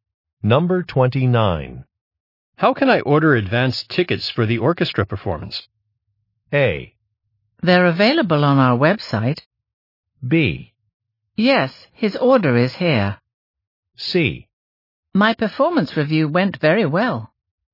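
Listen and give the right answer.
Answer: A: They're available on our website.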